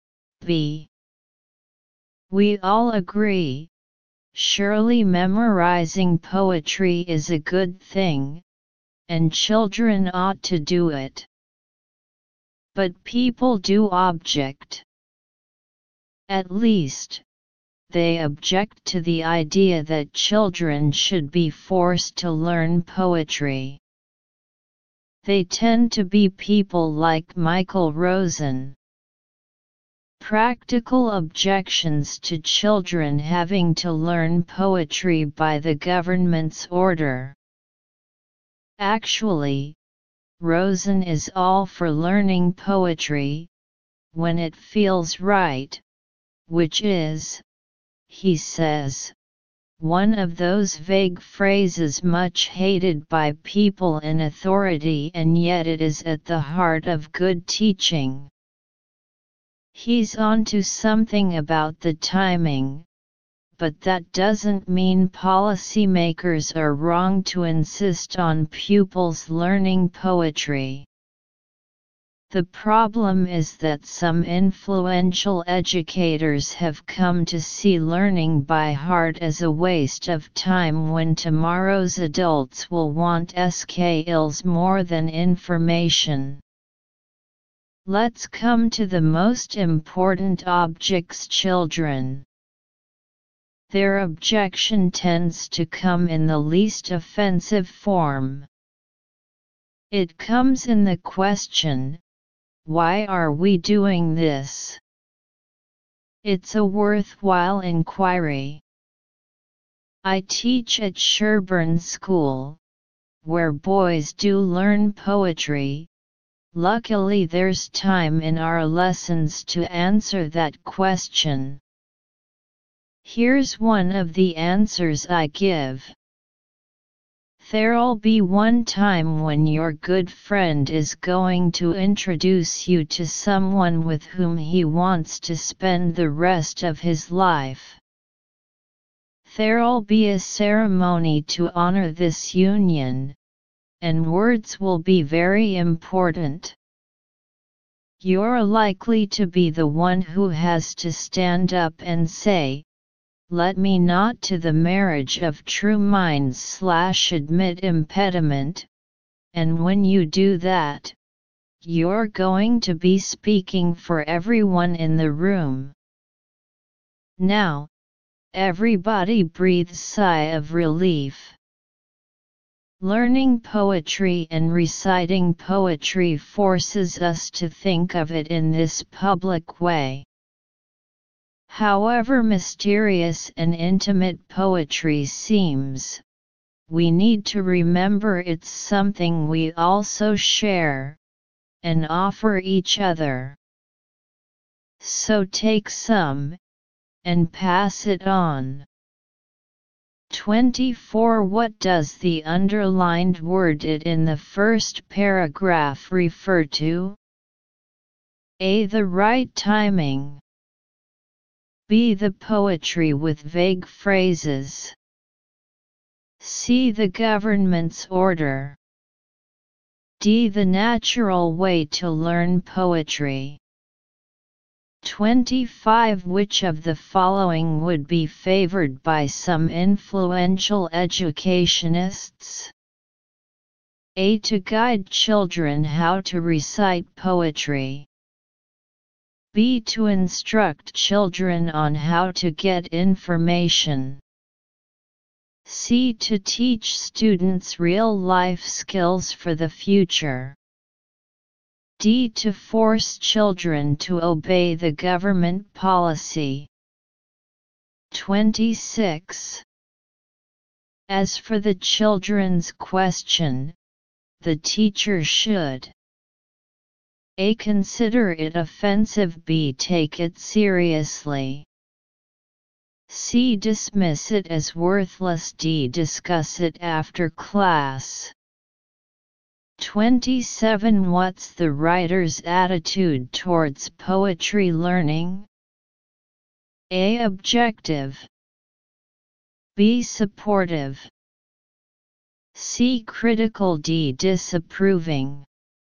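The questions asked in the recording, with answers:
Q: Which of the following would be favored by some influential educationists?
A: C: To teach students real-life skills for the future.

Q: As for the children's question, the teacher should: A.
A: B: Take it seriously.

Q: What's the writer's attitude towards poetry learning?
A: B: Supportive.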